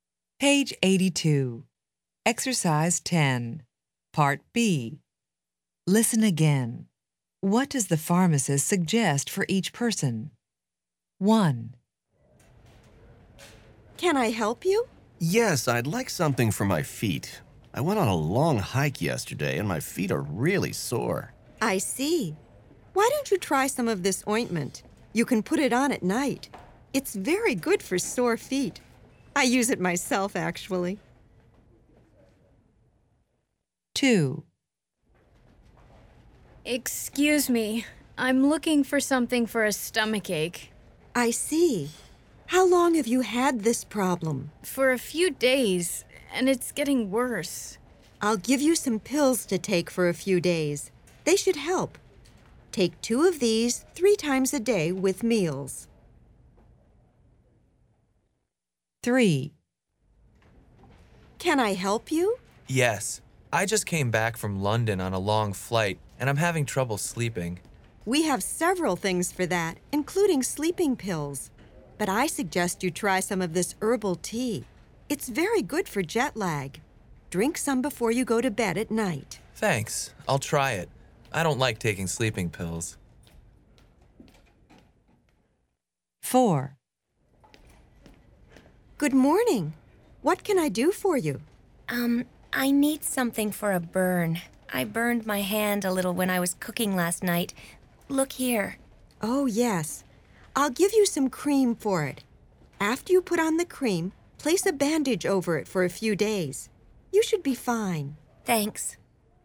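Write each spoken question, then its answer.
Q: What does the pharmacist suggest for each person?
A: ointment for sore feet, put on at night

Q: What does the pharmacist suggest for each person?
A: pills, 2 three times a day with meals

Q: What does the pharmacist suggest for each person?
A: herbal tea before bed

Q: What does the pharmacist suggest for each person?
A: cream and a bandage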